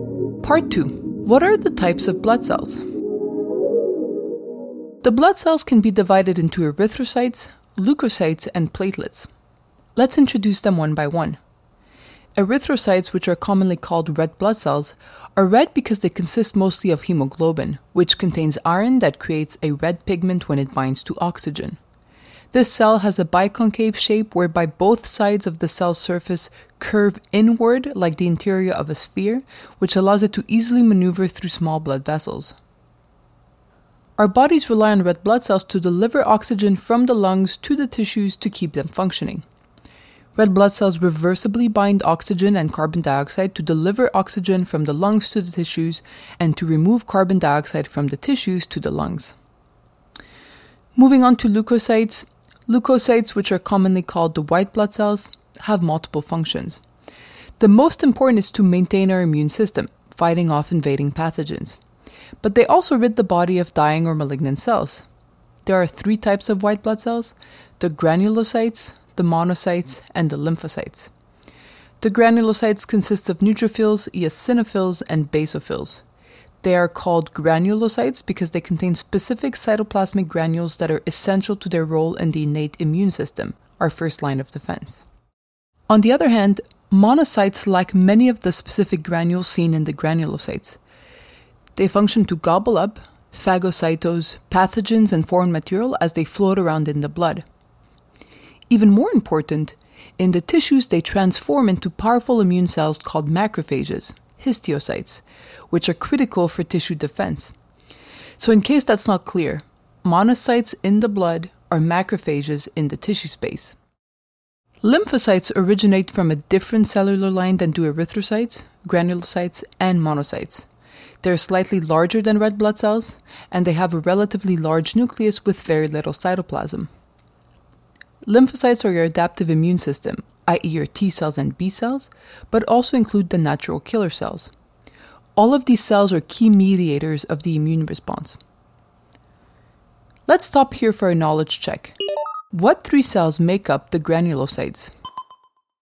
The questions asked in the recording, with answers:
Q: What three cells make up the granulocytes?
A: Those would be the eosinophils, the basophils, and the neutrophils.